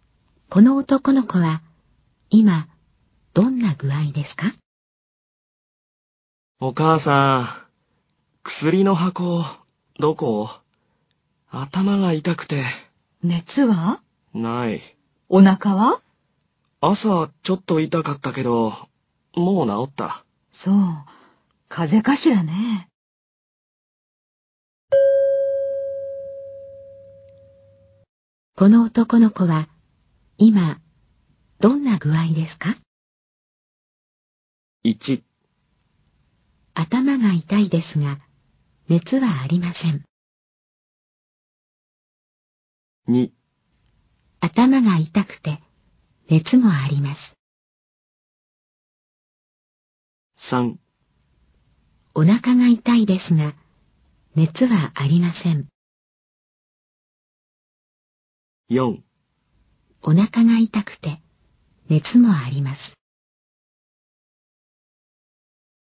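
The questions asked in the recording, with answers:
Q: この男の子は今どんな具合ですか?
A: 1: 頭が痛いですが熱はありません。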